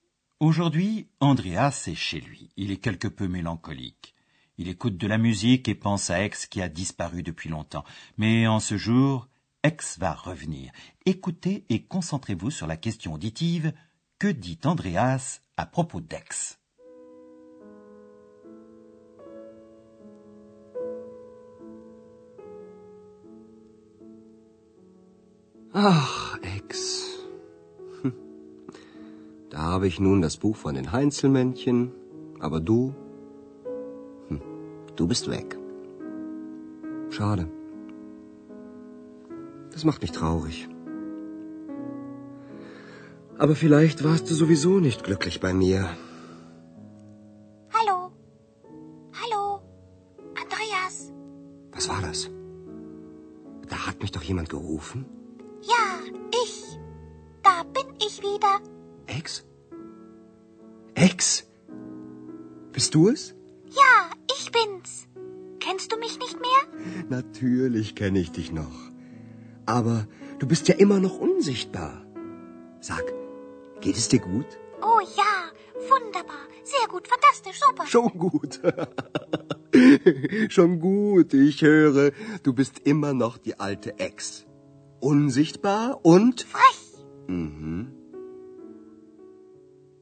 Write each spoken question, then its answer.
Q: Que dit Andreas à propos d'Aix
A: Andreas constate qu'Ex n'a pas changé, qu'elle est toujours comme autrefois.